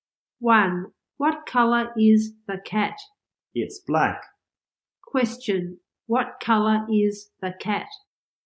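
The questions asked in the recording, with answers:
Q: What color is the cat?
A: Black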